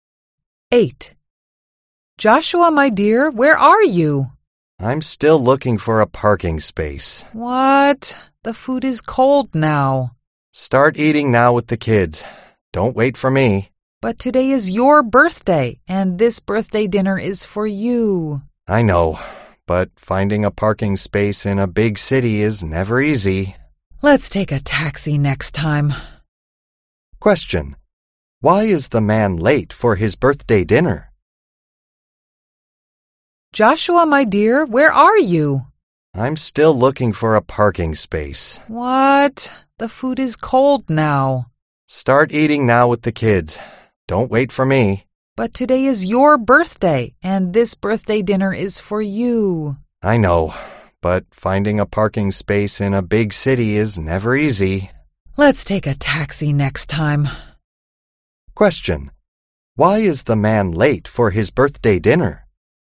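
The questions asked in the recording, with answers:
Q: Why is the man late for his birthday dinner?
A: He is still looking for a parking space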